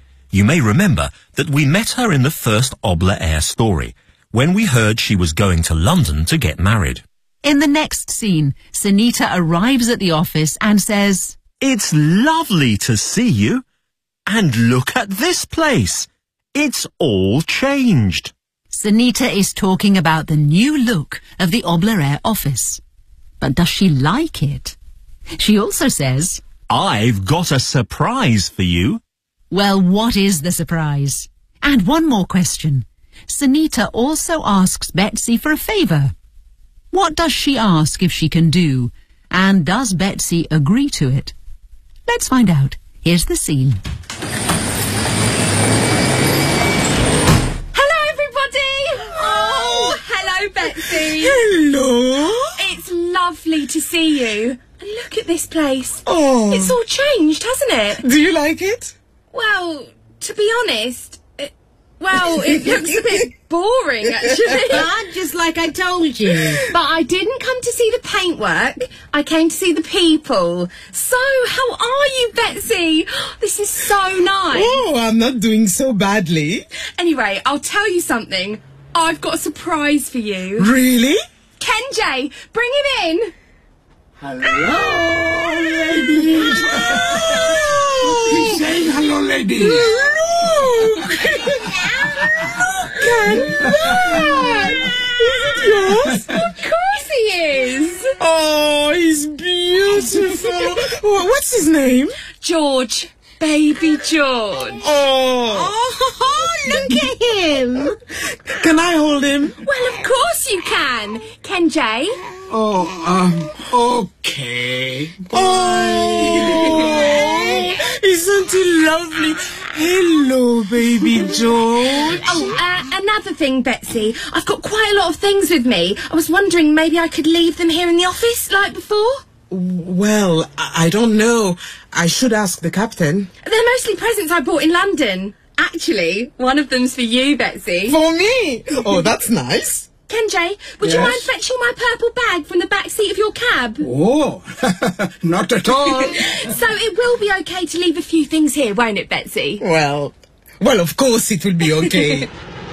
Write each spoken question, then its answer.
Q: But does she like it?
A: Not really.

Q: Well, what is the surprise?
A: She's got a baby.

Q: What does she ask if she can do?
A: I was wondering, maybe I could leave them here in the office, like before.

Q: And does Betsy agree to it?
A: Well, of course it'll be okay.